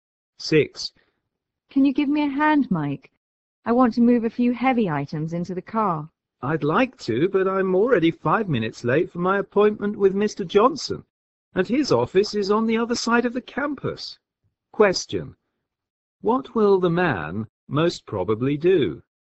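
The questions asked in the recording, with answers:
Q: What will the man most probably do?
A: Go to his appointment with Mr. Johnson rather than help.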